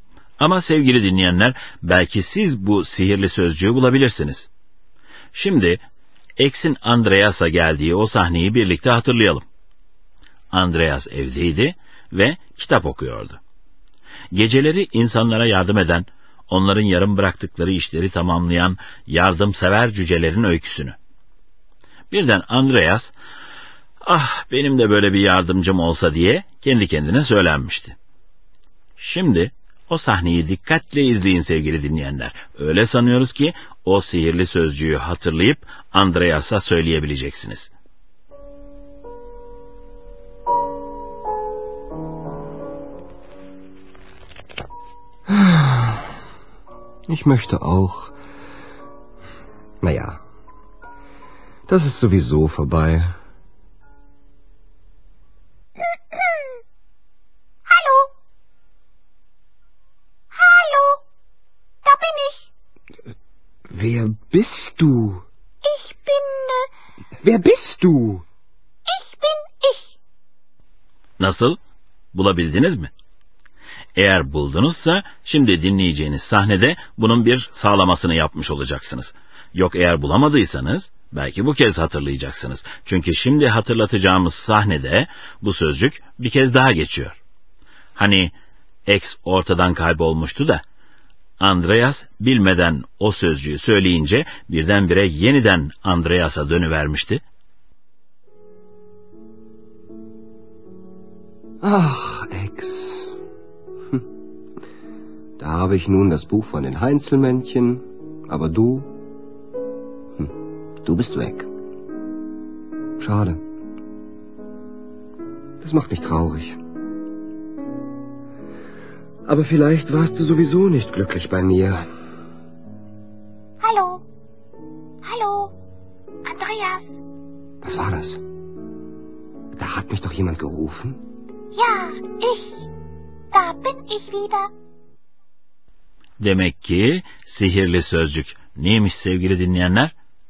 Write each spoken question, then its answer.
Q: Demek ki sihirli sözcük neymiş sevgili dinleyenler?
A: Sowieso.